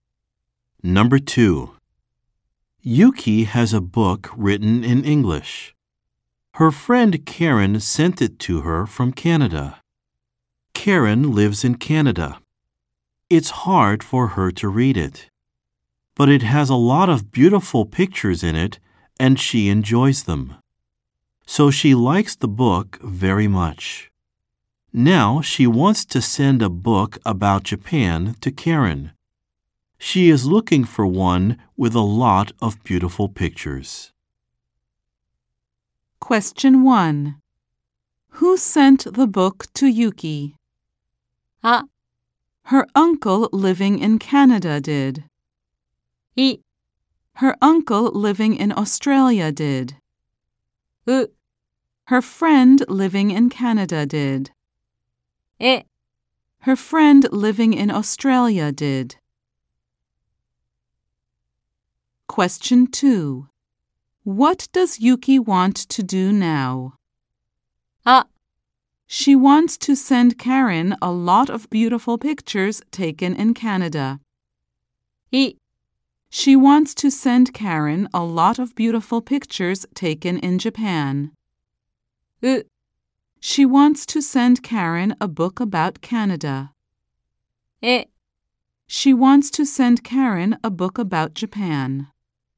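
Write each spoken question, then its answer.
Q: Who sent the book to Yuki?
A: U: Her friend living in Canada did.

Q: What does Yuki want to do now?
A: E: She wants to send Karen a book about Japan.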